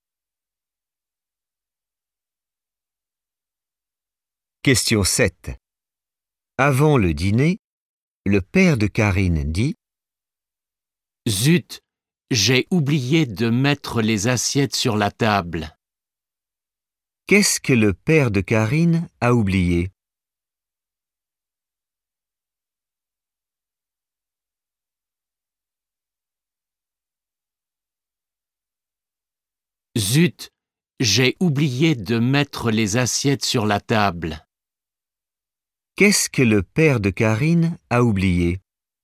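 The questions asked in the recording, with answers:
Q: Qu'est-ce que le père de Karine a oublié?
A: de mettre les assiettes sur la table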